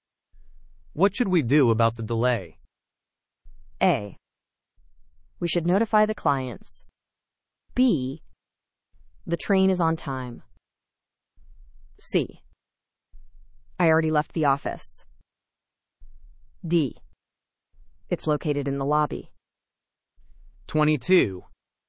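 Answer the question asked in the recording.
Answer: A: We should notify the clients.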